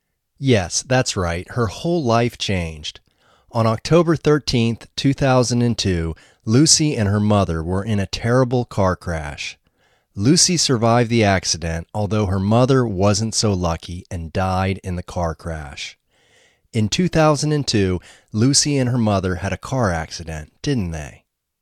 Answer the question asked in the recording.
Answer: Yes, they had a terrible car accident in 2002.